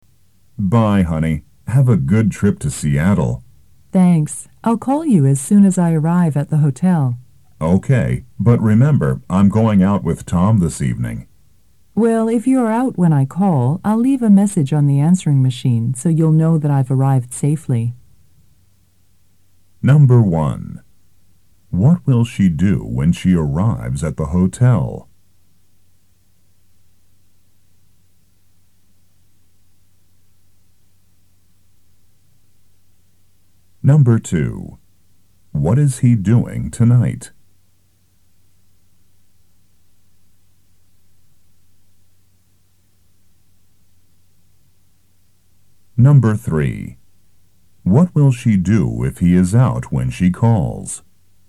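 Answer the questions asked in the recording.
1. Call him
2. Going out with Tom
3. Leave a message on the answering machine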